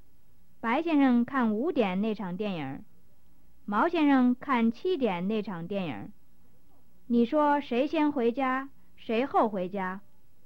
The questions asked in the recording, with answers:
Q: 你说谁先回家谁后回家?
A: 白先生先回家,毛先生后回家。